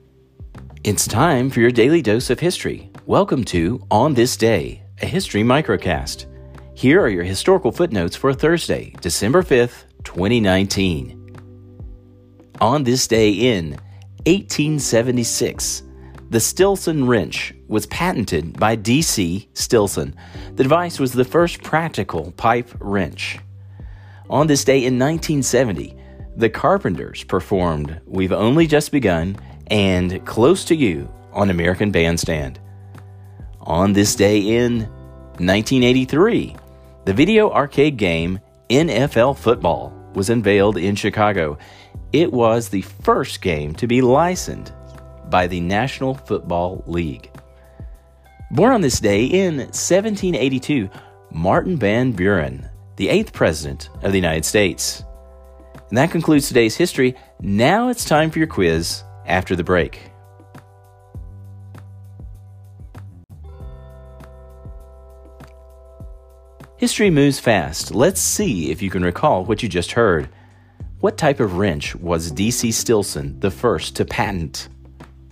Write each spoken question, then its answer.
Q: What type of wrench was D.C. Stilson the first to patent?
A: Answer, the pipe wrench.